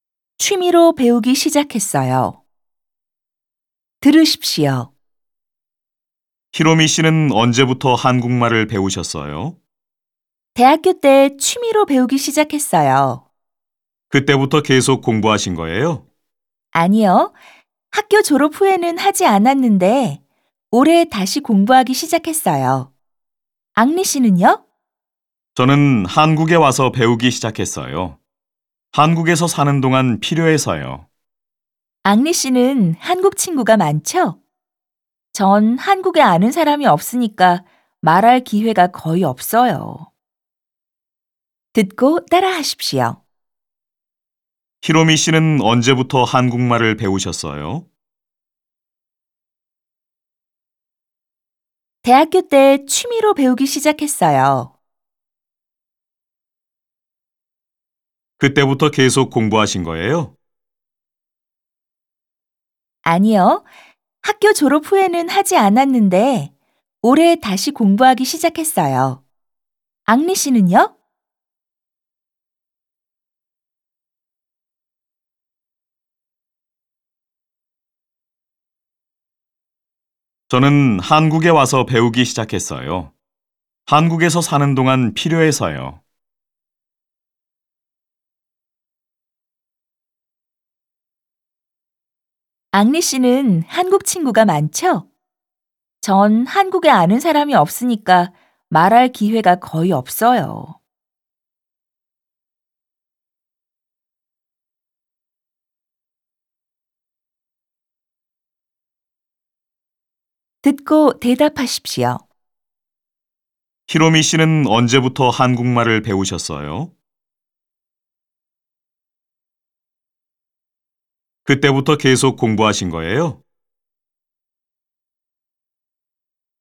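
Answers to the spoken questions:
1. 대학교 때 취미로 배우기 시작했어요.
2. 아니요. 졸업 후에는 하지 않았고 올해 다시 시작했어요.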